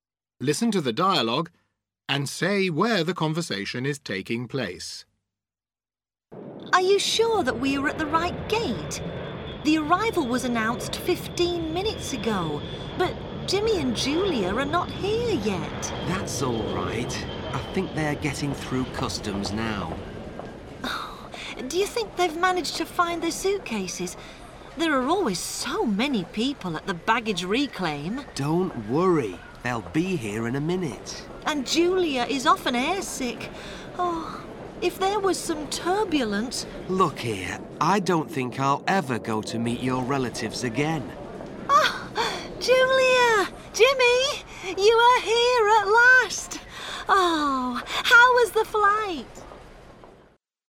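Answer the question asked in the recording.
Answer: At the airport (arrivals gate)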